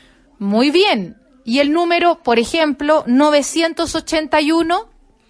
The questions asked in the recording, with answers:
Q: ¿Y el número, por ejemplo, 981?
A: 900 más 80 más 1.